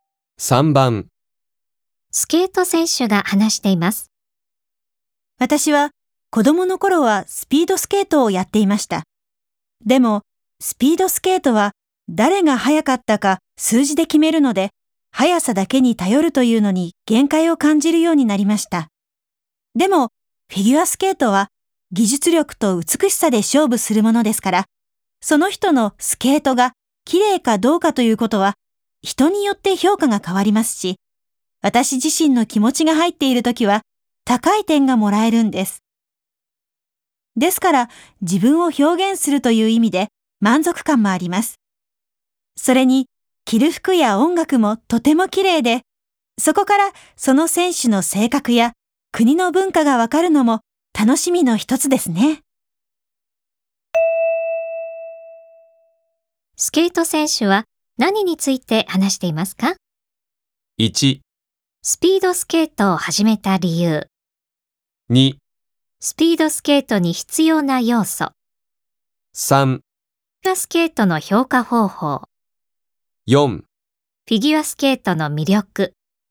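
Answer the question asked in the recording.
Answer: 4: フィギュアスケートの魅力。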